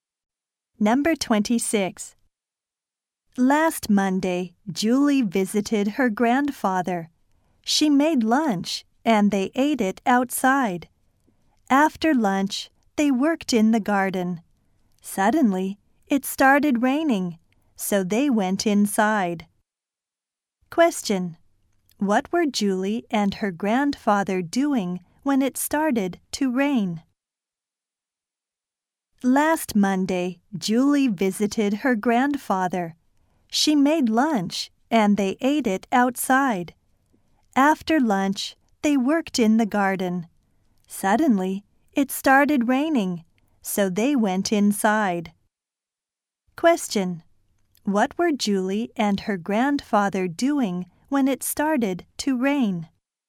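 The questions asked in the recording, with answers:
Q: What were Julie and her grandfather doing when it started to rain?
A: Working in the garden.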